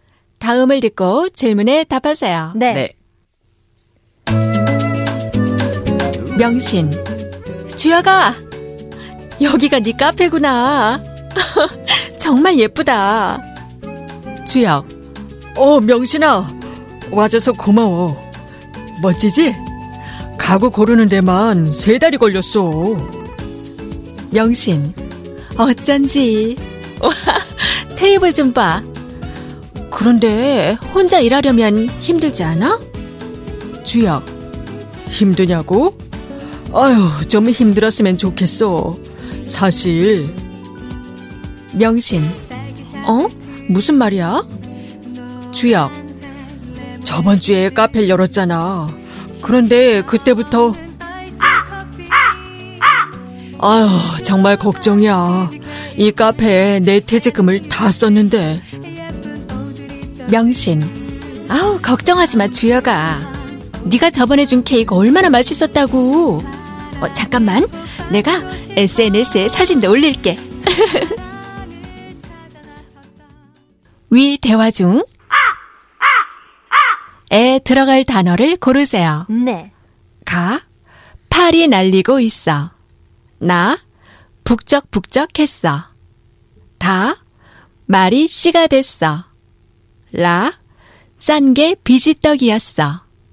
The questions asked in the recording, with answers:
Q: 위 대화 중 에 들어갈 단어를 고르세요.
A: which means the answer is 가.